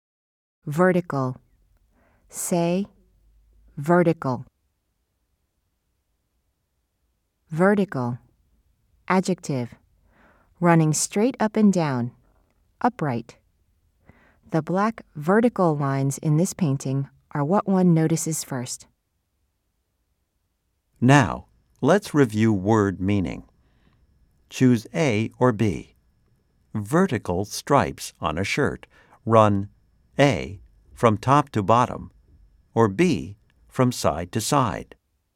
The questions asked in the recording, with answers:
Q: Choose A or B. Vertical stripes on a shirt run A, from top to bottom, or B, from side to side.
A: If you said A, you are correct.